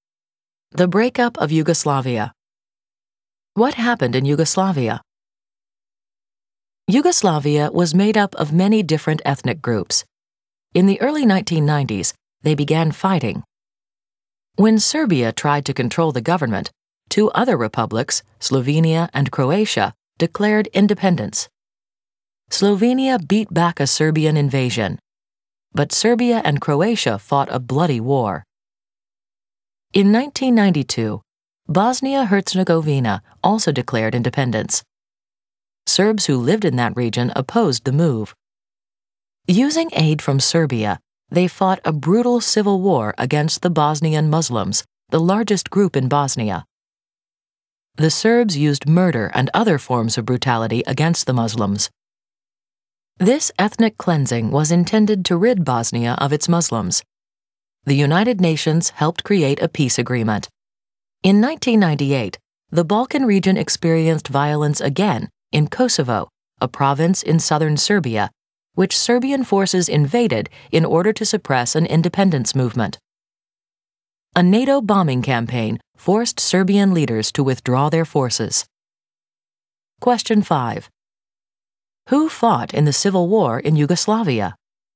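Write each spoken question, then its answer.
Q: Who fought in the civil war in Yugoslavia?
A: Bosnian Serbs (aided by Serbia) against Bosnian Muslims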